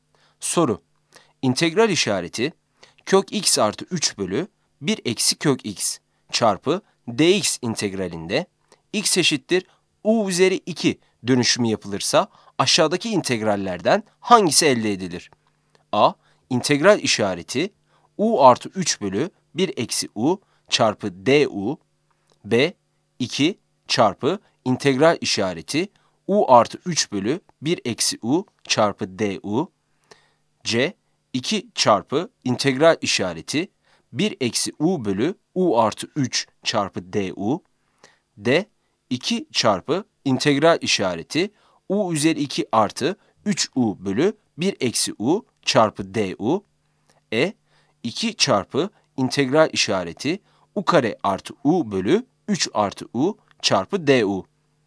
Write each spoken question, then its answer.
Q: İntegral işareti kök x artı 3 bölü 1 eksi kök x çarpı dx integralinde x eşittir u üzeri 2 dönüşümü yapılırsa aşağıdaki integrallerden hangisi elde edilir?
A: Yanıt D'dir.